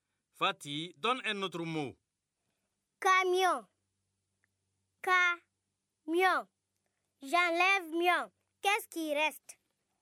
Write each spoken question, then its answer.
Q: Qu'est-ce qui reste?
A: C'est cas, monsieur.